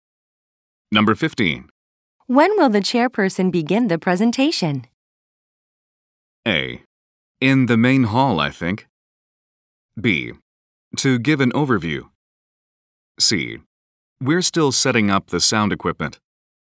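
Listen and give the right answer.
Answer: C: We're still setting up the sound equipment.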